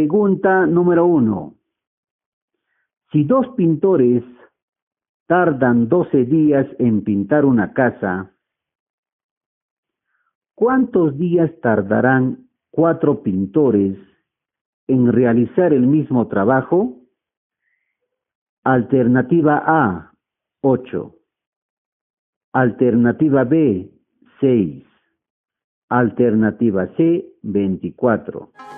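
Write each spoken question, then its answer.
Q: Si dos pintores tardan 12 días en pintar una casa, ¿cuántos días tardarán cuatro pintores en realizar el mismo trabajo?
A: B: 6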